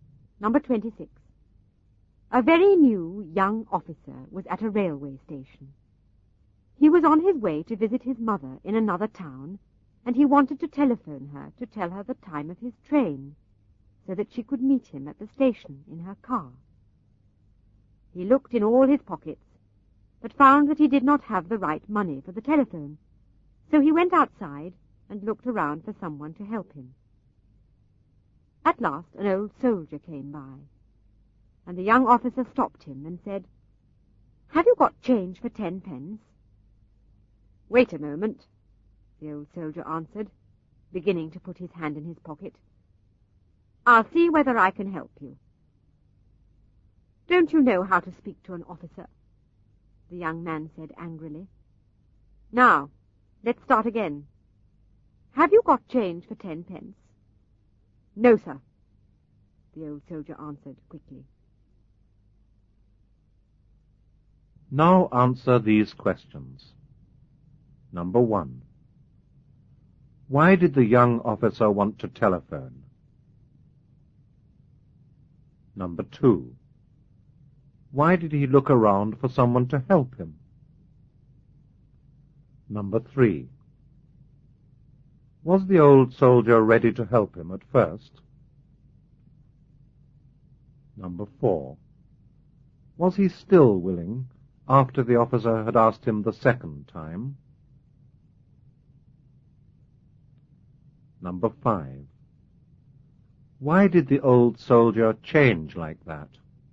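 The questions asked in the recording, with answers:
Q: Why did the young officer want to telephone?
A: To tell his mother the time of his train so she could meet him at the station

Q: Why did he look around for someone to help him?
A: He did not have the right money for the telephone

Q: Was the old soldier ready to help him at first?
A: Yes

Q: Was he still willing after the officer had asked him the second time?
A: No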